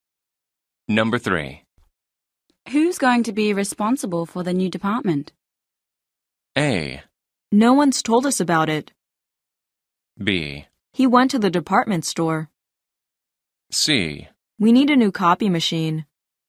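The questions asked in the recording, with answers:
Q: Who's going to be responsible for the new department?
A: A: No one's told us about it.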